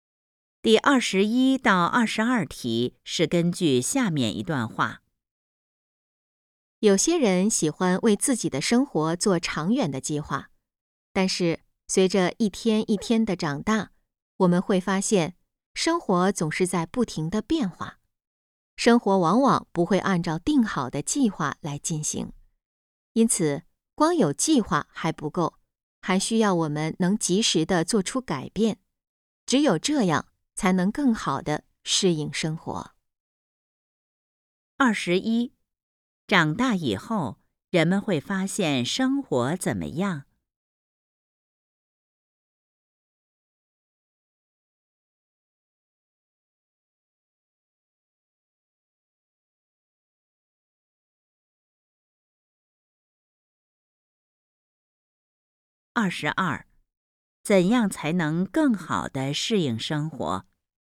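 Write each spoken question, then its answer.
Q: 长大以后,人们会发现生活怎么样?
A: 总是在不停地变化

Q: 怎样才能更好地适应生活?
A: 及时做出改变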